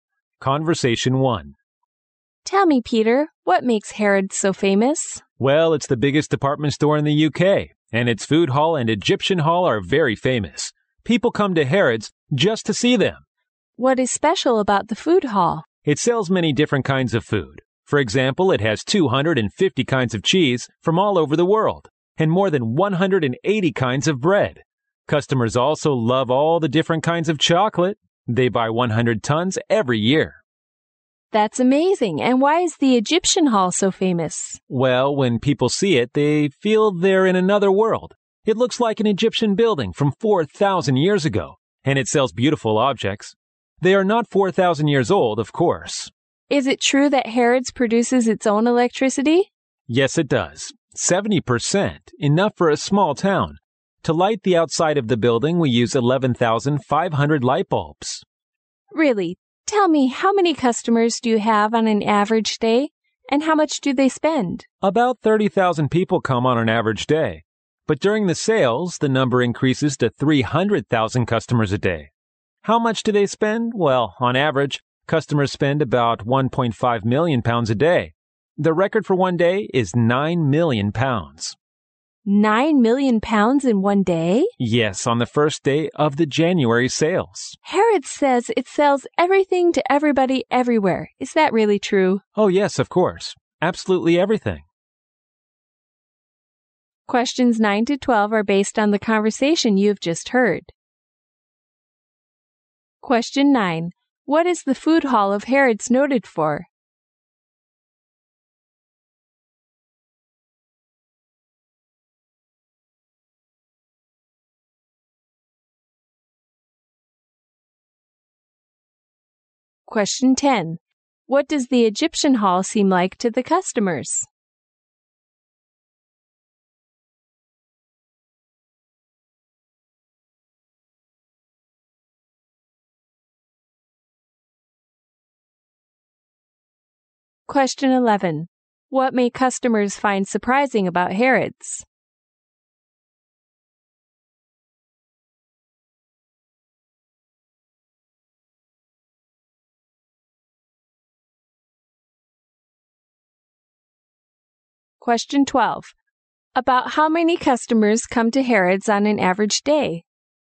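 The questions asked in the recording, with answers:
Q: What is the Food Hall of Harrods noted for?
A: Its wide variety of food.

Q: What does the Egyptian Hall seem like to the customers?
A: Like another world.

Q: About how many customers come to Harrods on an average day?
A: About 30,000.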